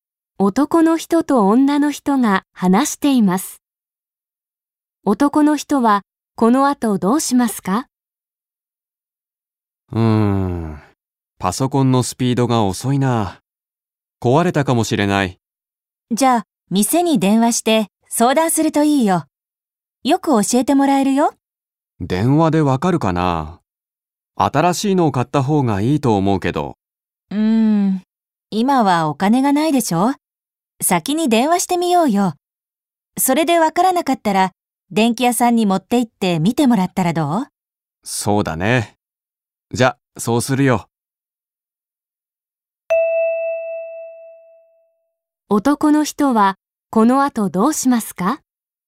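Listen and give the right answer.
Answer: 店に電話して相談する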